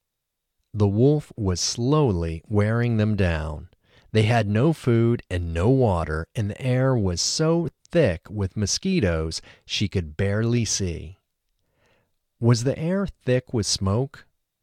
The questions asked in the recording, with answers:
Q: Was the air thick with smoke?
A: No, the air wasn't thick with smoke.